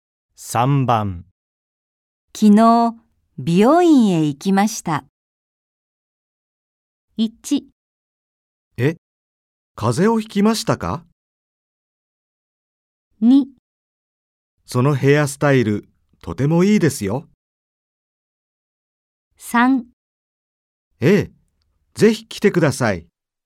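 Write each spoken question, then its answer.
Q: 昨日美容院へ行きました。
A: 2: そのヘアスタイル、とてもいいですよ。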